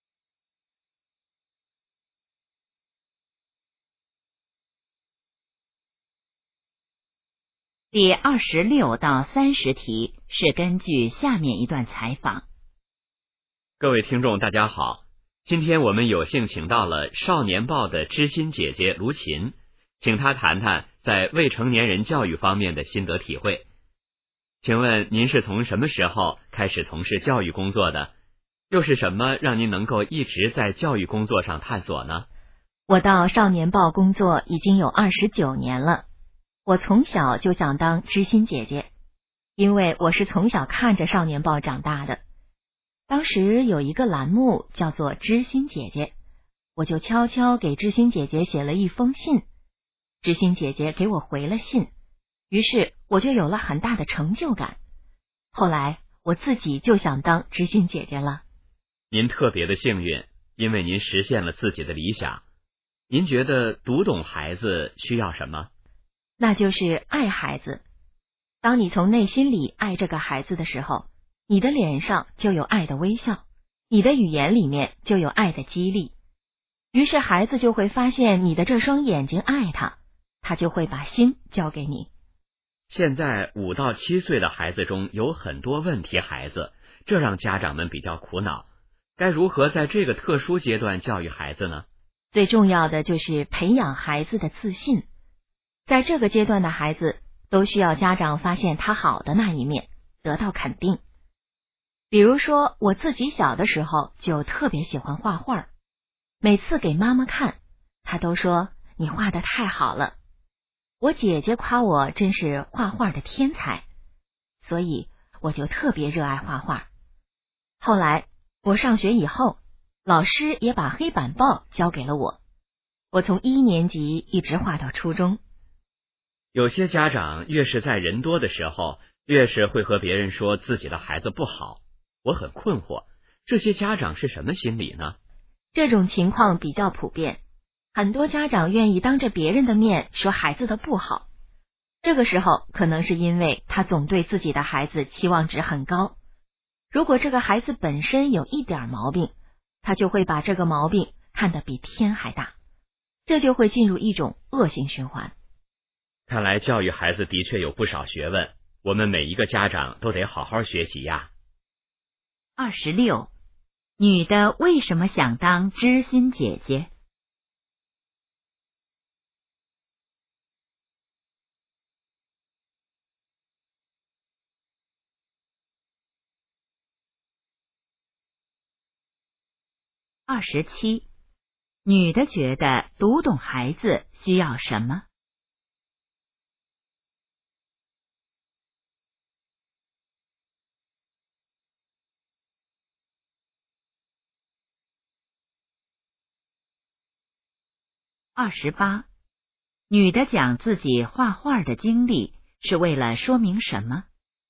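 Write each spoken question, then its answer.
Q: 女的为什么想当知心姐姐?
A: 小时候给知心姐姐写信得到回信,有很大成就感

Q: 女的觉得读懂孩子需要什么?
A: 爱孩子

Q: 女的讲自己画画的经历是为了说明什么?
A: 要培养孩子的自信,肯定孩子

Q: 为什么有些家长当着别人的面批评孩子?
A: 对孩子期望值太高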